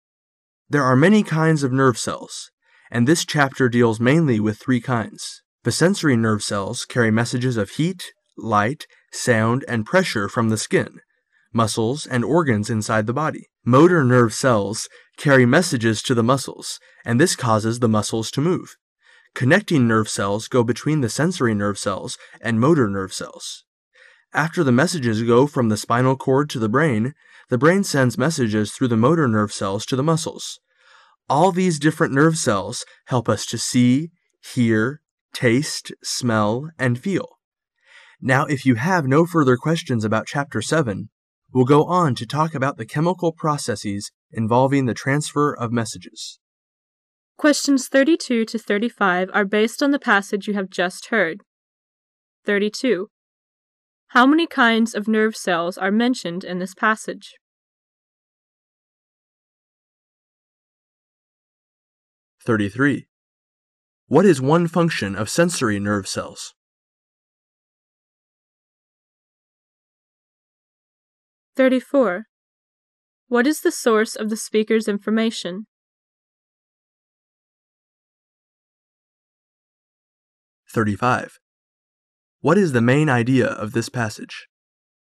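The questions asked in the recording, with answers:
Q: How many kinds of nerve cells are mentioned in this passage?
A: Three

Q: What is one function of sensory nerve cells?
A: To carry messages of heat, light, sound and pressure from the skin, muscles and organs

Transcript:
[解析] 32-35 There are many kinds of nerve cells, and this chapter deals mainly with three kinds. The sensory nerve cells carry messages her heat, light, sound and pressure from the skin, muscles and organs inside the body. Motor nerve cells carry messages to the muscles, and this causes the muscles to move. Connecting nerve cells go between the sensory nerve cells and motor nerve cells. After the messages go from the spinal cord to the brain, the brain sends messages through the motor nerve cells to the muscles. All these different nerve cells help us to see, hear, taste, smell and feel. Now if you have no further questions about chapter seven, we'll go on to talk about the chemical processes involving the transfer of messages.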